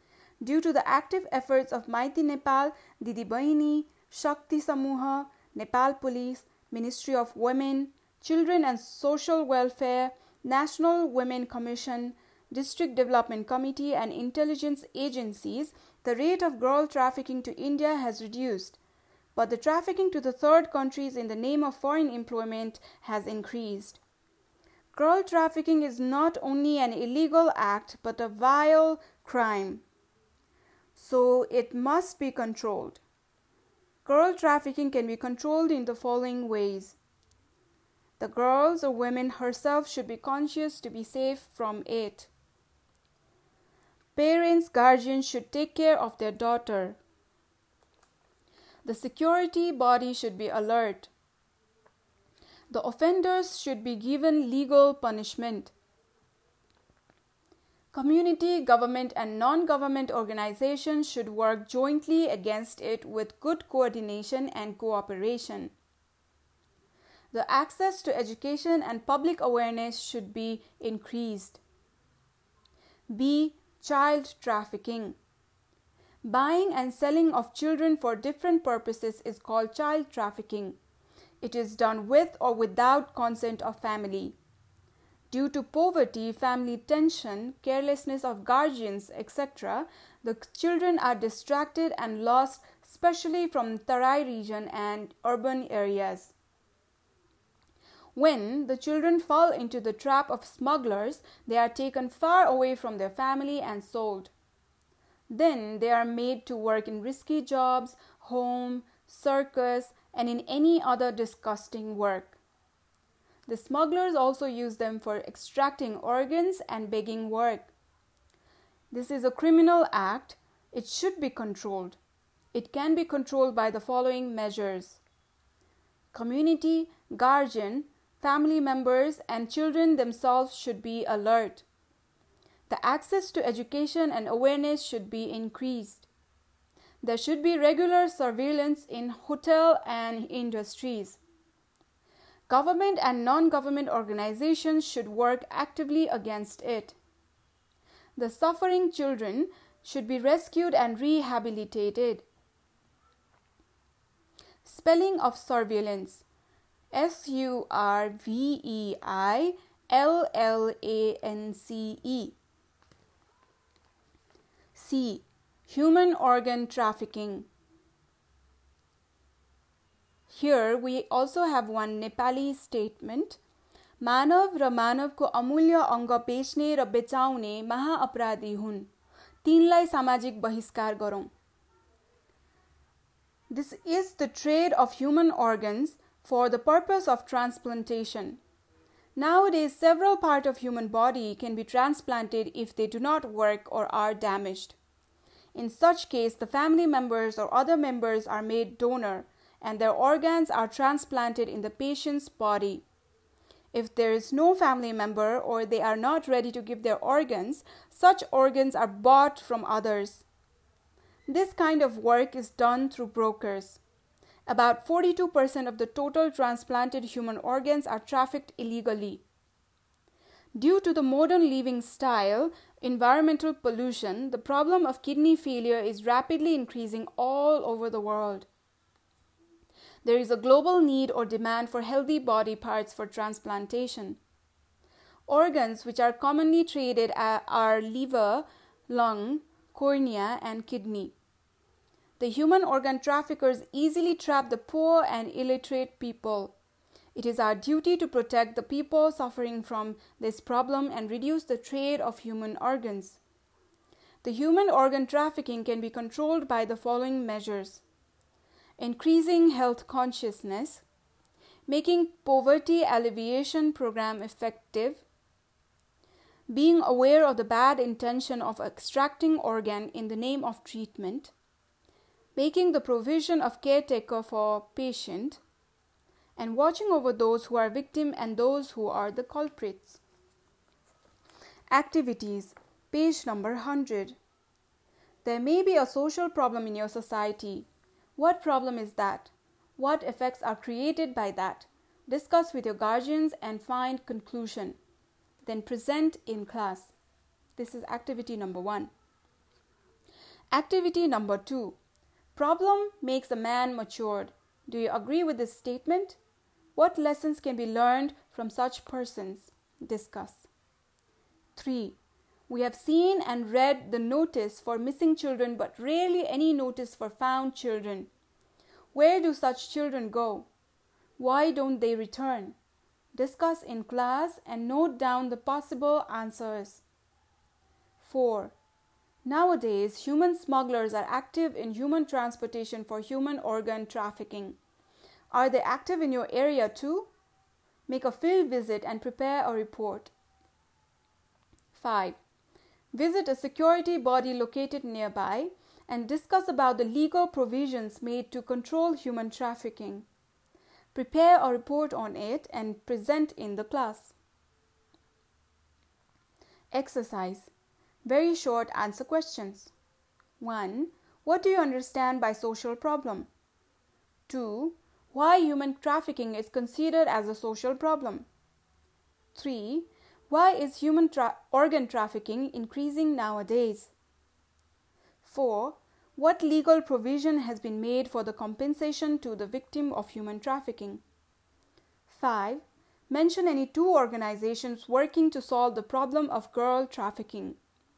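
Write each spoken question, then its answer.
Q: Why is human tra- organ trafficking increasing nowadays?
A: Kidney failure is increasing rapidly because of modern lifestyles and environmental pollution, so there is a global demand for healthy body parts for transplantation

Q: Mention any two organizations working to solve the problem of girl trafficking.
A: Maiti Nepal and Shakti Samuha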